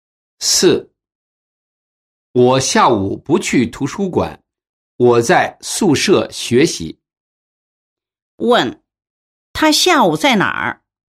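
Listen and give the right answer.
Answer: 宿舍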